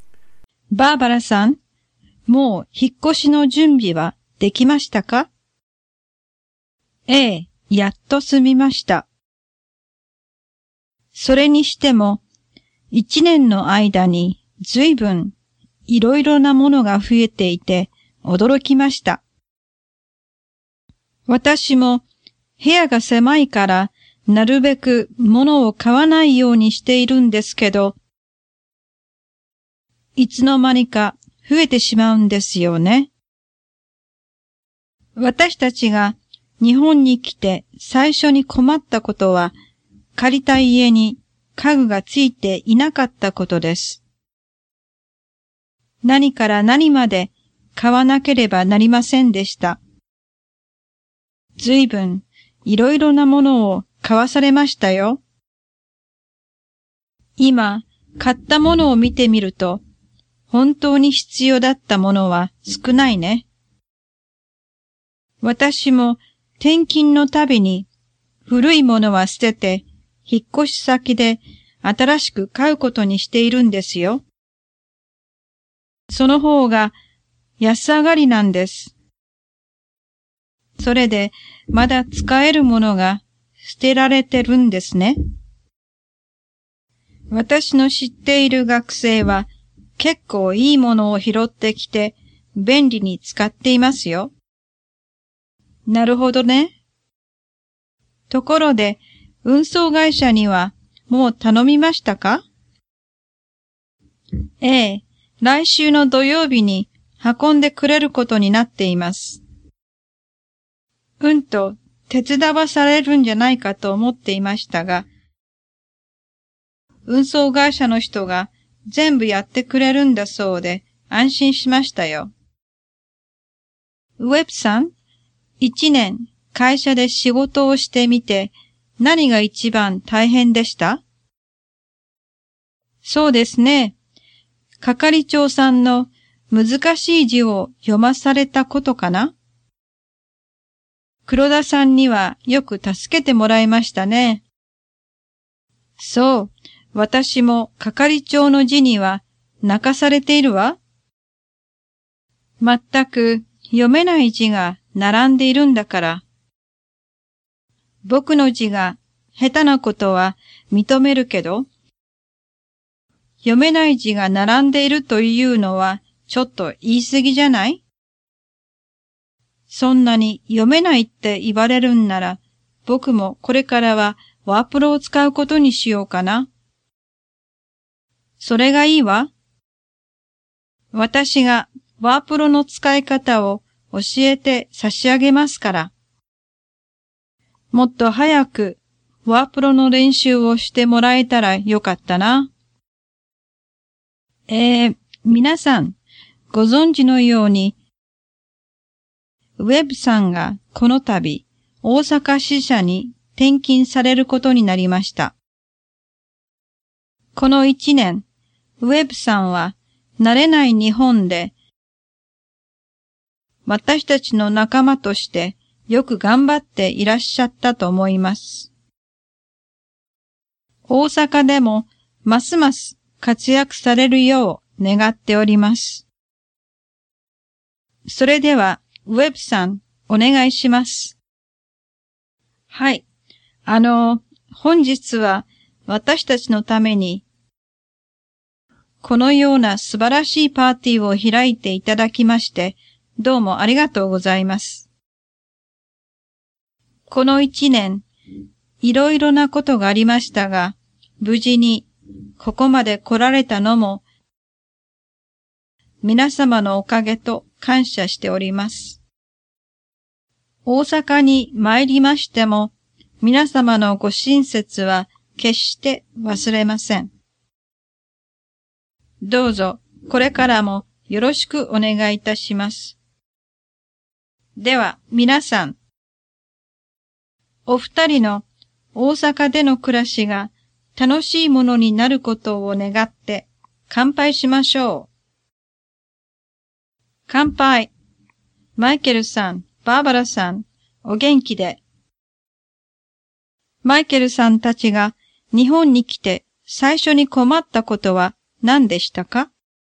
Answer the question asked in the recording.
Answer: 借りた家に家具がついていなかったことです。